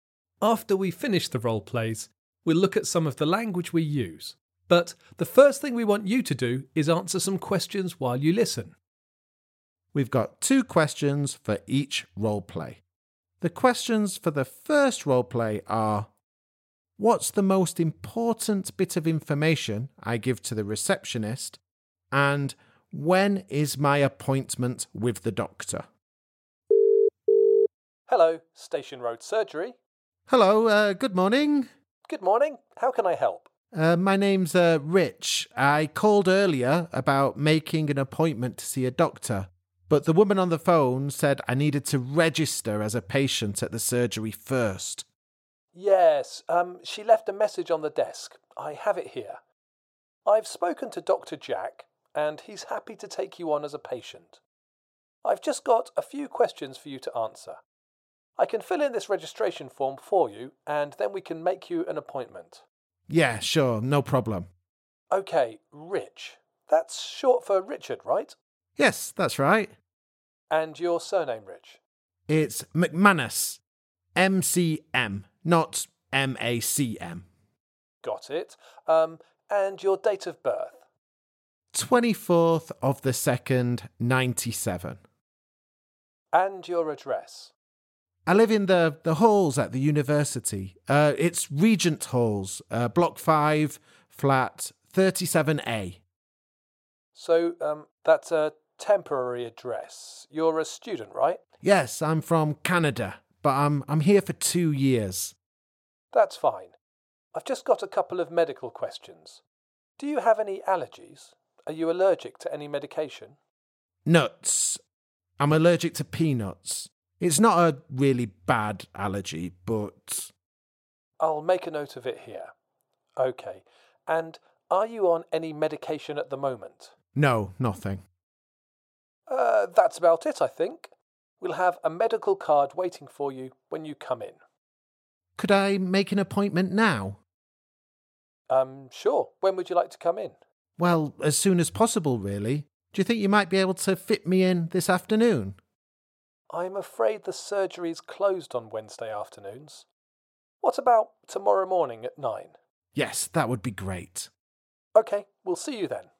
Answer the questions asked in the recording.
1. Well, I suppose the most important bit of information you gave was your allergy to nuts.
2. And in the end, I made an appointment for Thursday morning at nine o'clock.